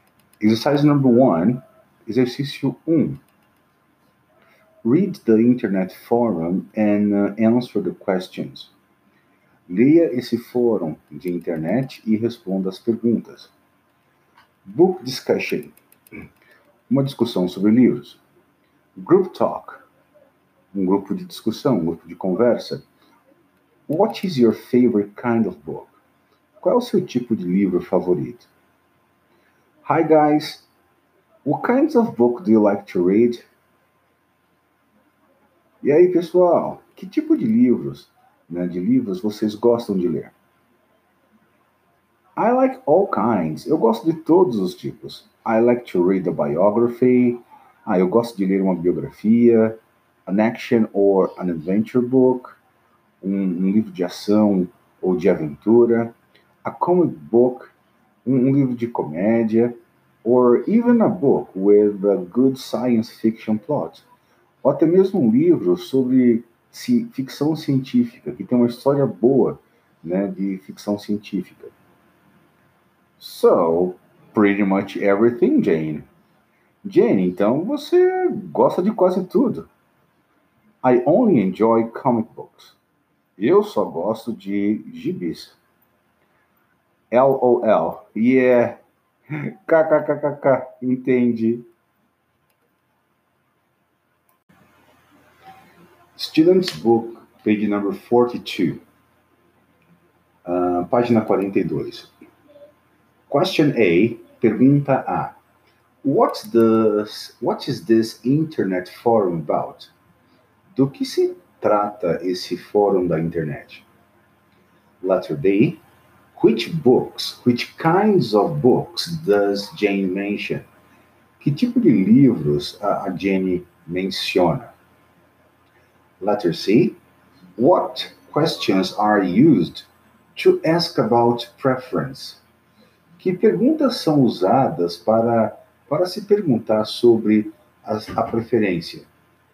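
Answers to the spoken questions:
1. Books / what kinds of books people like to read
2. Biography, action or adventure books, comic books and science fiction
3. What is your favorite kind of book? What kinds of book do you like to read?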